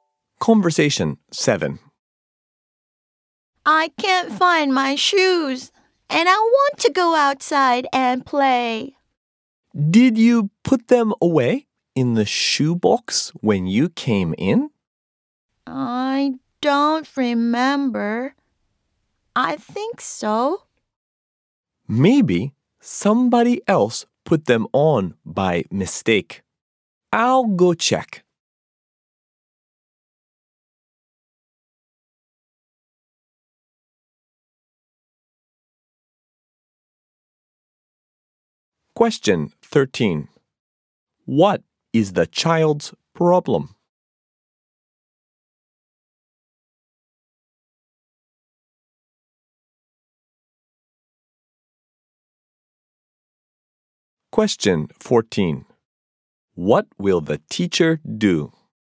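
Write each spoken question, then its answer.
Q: What is the child's problem?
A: The child can't find their shoes.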